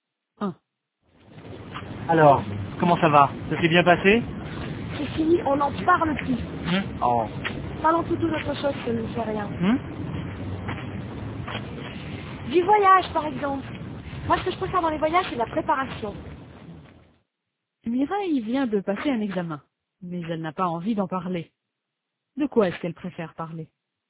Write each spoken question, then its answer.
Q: De quoi est-ce qu'elle préfère parler?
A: Du voyage.